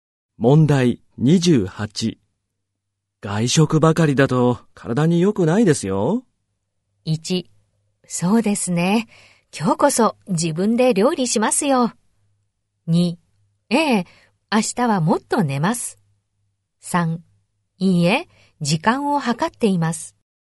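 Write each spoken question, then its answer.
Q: 外食ばかりだと体に良くないですよ。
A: 3: そうですね。今日こそ自分で料理しますよ。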